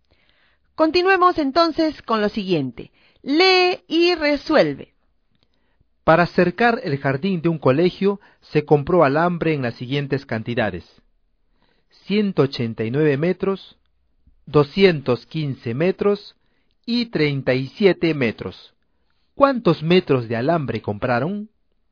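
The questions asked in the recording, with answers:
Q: ¿Cuántos metros de alambre compraron?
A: 441 metros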